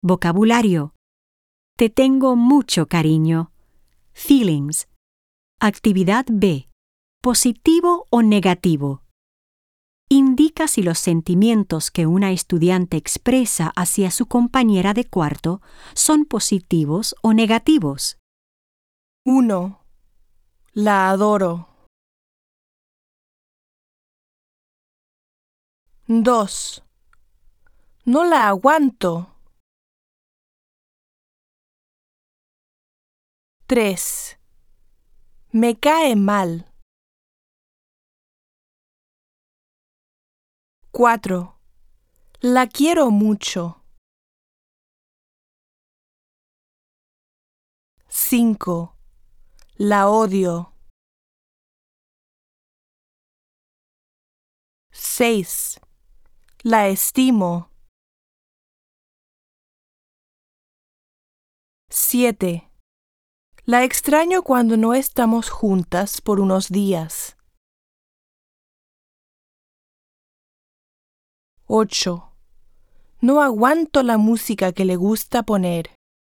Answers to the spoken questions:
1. 1. Positivo.
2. 2. Negativo.
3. 3. Negativo.
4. 4. Positivo.
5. 5. Negativo.
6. 6. Positivo.
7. 7. Positivo.
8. 8. Negativo.